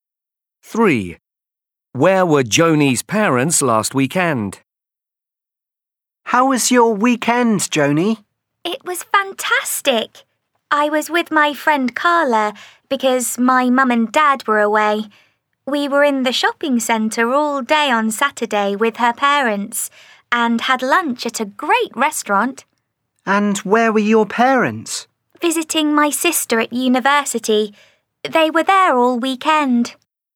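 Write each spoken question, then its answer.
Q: Where were Joni's parents last weekend?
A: At university visiting her sister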